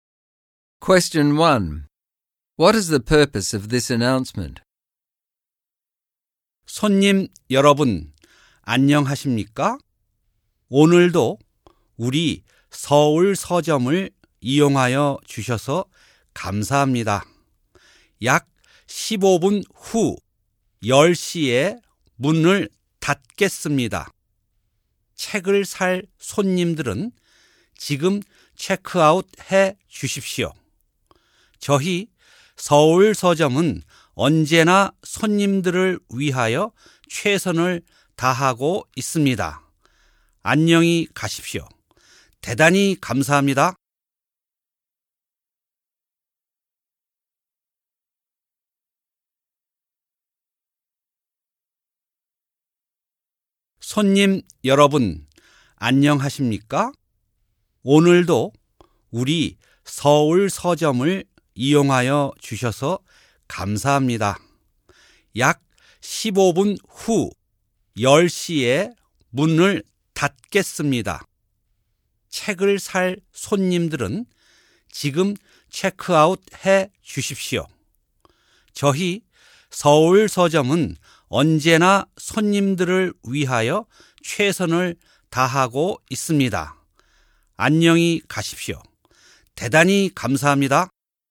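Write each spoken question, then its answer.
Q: What is the purpose of this announcement?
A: To tell customers the Seoul bookstore closes in about 15 minutes, at 10 o'clock, and that anyone buying books should check out now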